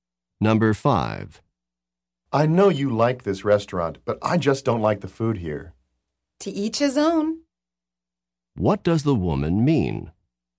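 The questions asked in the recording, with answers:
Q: What does the woman mean?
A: People have different tastes.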